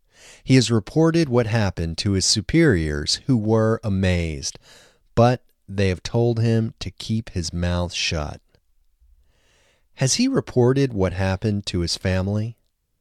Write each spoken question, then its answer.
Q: Has he reported what happened to his family?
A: No, he hasn't reported what has happened to his family.